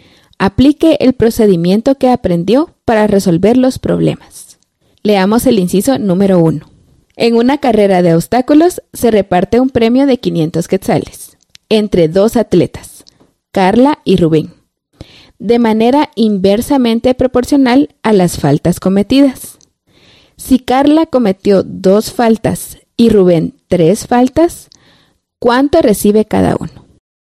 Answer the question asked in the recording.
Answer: Entonces, Carla recibe 300 quetzales y Rubén 200.